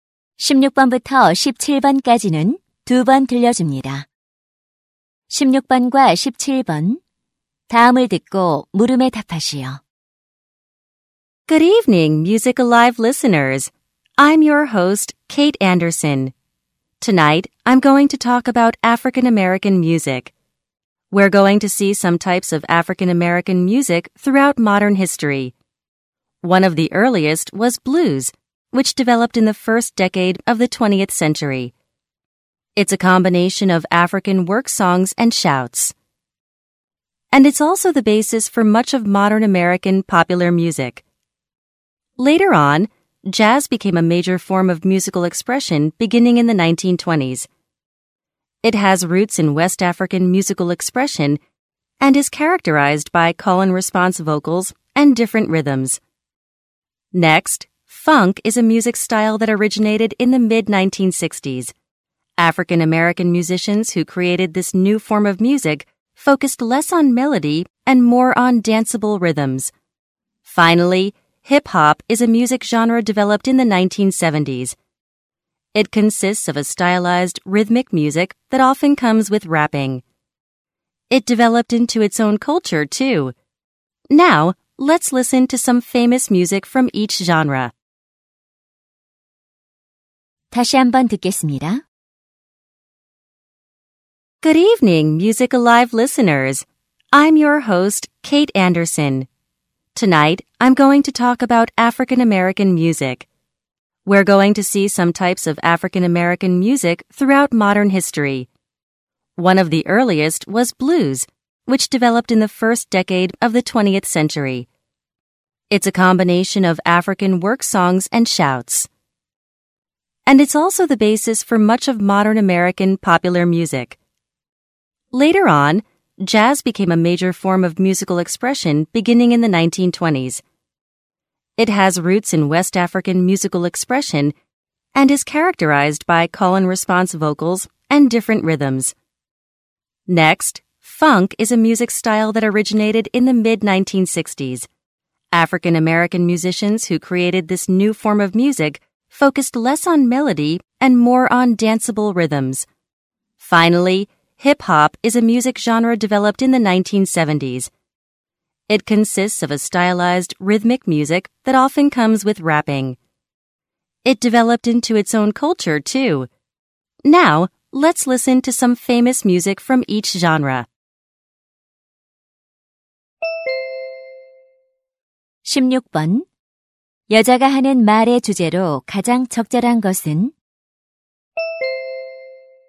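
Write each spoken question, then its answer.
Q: 여자가 하는 말의 주제로 가장 적절한 것은?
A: 근현대사 속 아프리카계 미국인 음악의 종류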